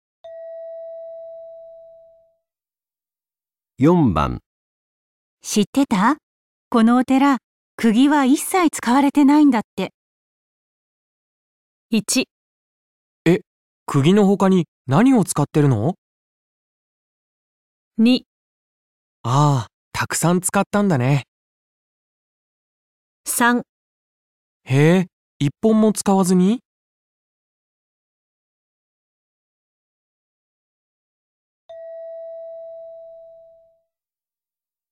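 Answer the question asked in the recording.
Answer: へぇー、 一本も使わずに?

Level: N1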